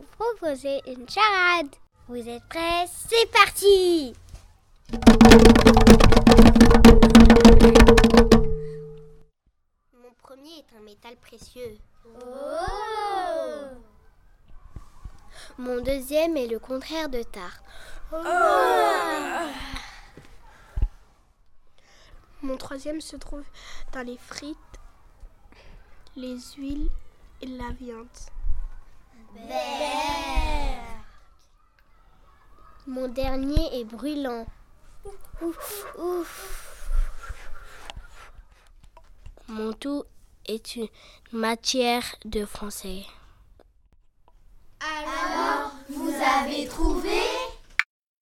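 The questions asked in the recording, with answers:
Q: Alors, vous avez trouvé?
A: l'orthographe (or-tôt-gras-feu)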